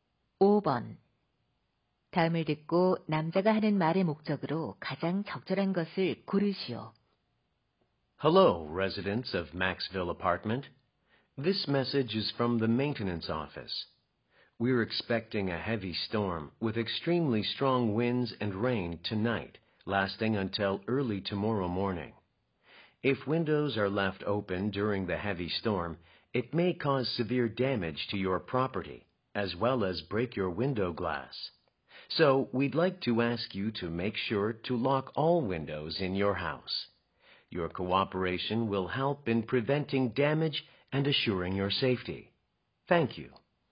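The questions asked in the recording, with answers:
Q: 다음을 듣고 남자가 하는 말의 목적으로 가장 적절한 것을 고르시오.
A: 폭풍에 대비해 모든 창문을 잠그도록 요청하려고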